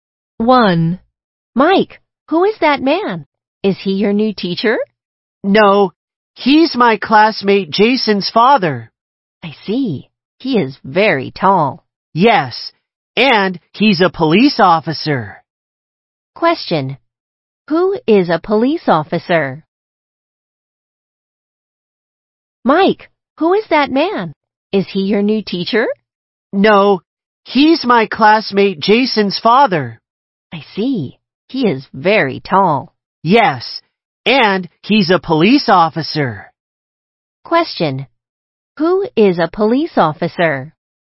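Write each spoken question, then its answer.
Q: Who is a police officer?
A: Jason's father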